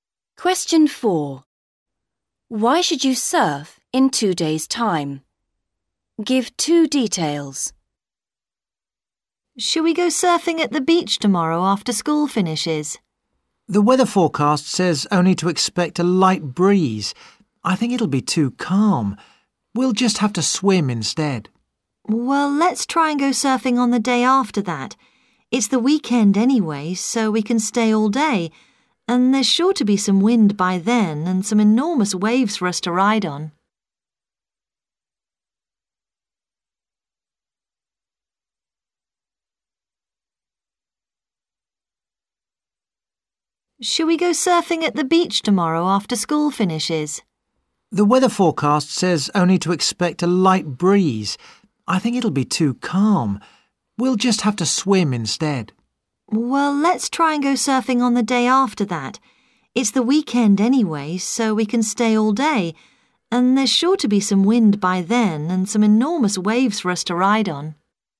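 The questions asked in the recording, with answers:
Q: Why should you surf in 2 days' time?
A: There will be wind and enormous waves; it's the weekend so you can stay all day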